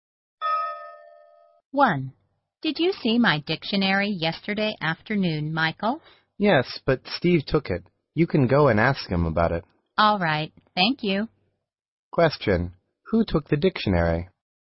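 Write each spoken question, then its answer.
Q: Who took the dictionary?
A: Steve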